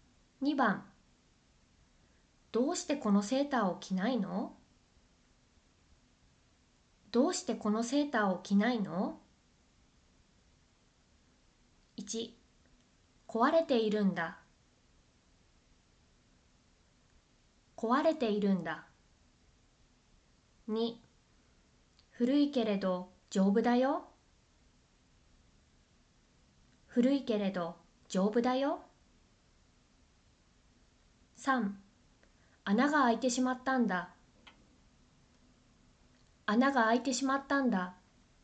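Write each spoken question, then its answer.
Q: どうしてこのセーターを着ないの?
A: 3: 穴が開いてしまったんだ。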